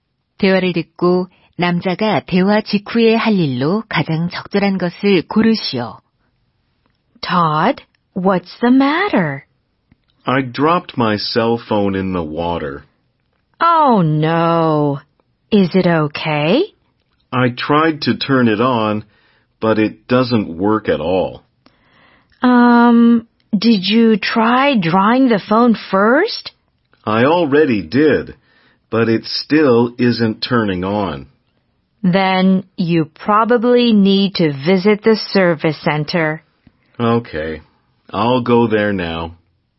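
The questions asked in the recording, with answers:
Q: 대화를 듣고 남자가 대화 직후에 할 일로 가장 적절한 것을 고르시오.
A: 서비스 센터 방문하기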